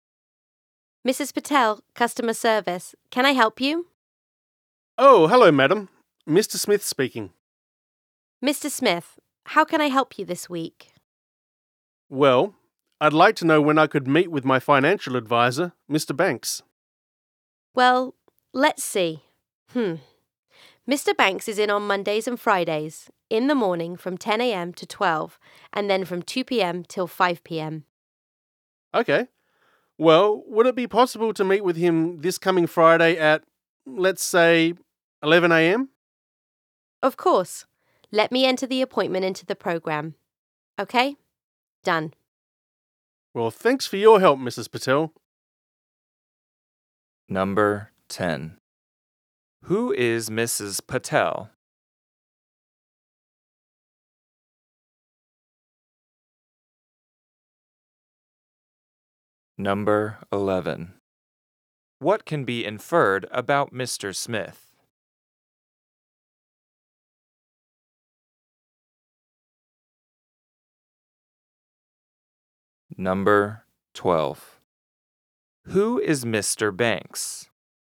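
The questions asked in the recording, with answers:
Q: Who is Mrs. Patel?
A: A customer service representative

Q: Who is Mr. Banks?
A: Mr. Smith's financial advisor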